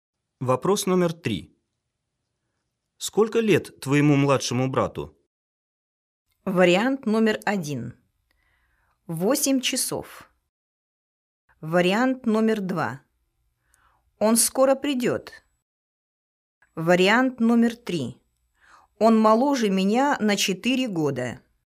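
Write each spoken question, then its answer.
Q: Сколько лет твоему младшему брату?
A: 3: Он моложе меня на 4 года.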